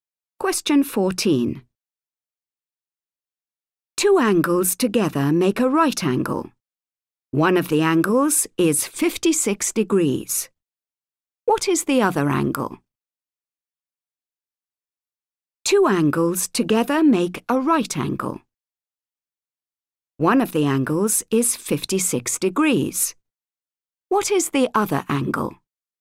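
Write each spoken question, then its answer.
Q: What is the other angle?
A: 34 degrees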